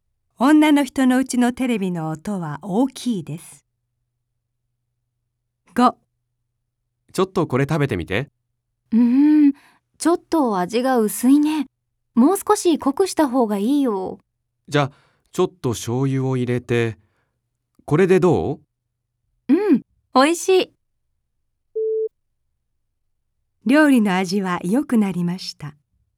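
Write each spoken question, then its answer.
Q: 料理の味は良くなりました。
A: ○(正しい)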